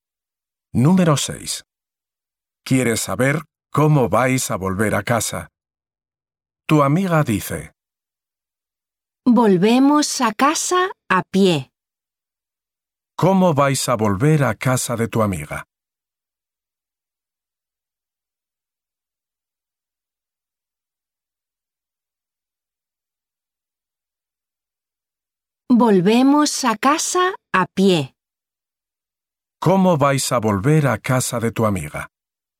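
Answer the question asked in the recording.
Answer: A pie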